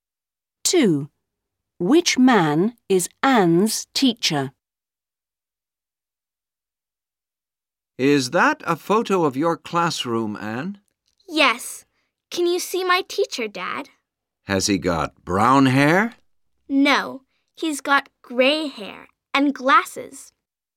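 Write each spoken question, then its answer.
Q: Which man is Anne's teacher?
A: the man with gray hair and glasses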